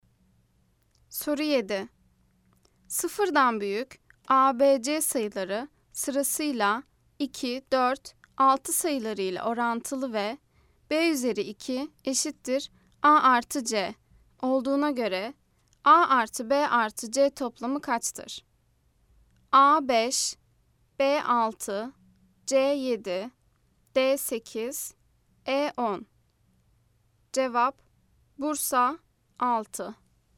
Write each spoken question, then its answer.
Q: Sıfırdan büyük ABC sayıları sırasıyla 2, 4, 6 sayılarıyla orantılı ve B üzeri 2 eşittir A artı C olduğuna göre A artı B artı C toplamı kaçtır?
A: Cevap Bursa 6.